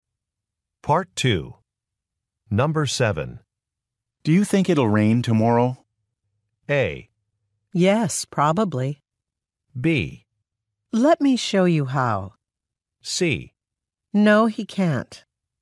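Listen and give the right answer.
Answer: A: Yes, probably.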